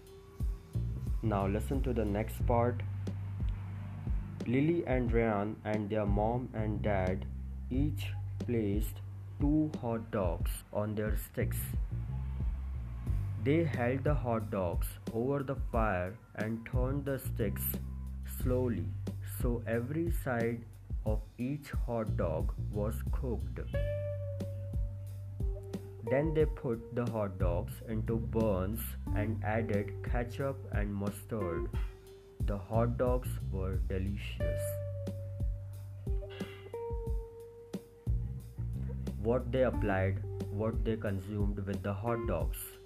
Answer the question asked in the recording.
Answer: Ketchup and mustard.